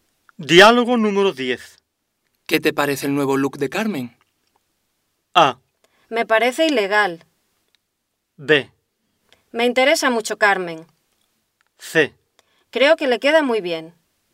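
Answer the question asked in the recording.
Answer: C: Creo que le queda muy bien.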